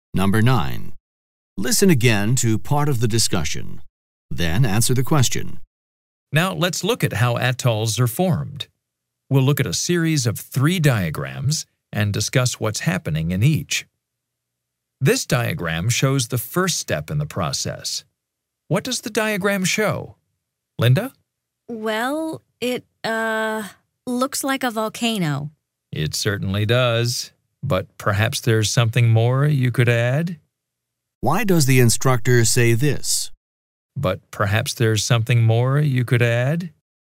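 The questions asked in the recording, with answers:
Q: Why does the instructor say this?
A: To suggest that Linda's answer is incomplete and encourage her to say more about the diagram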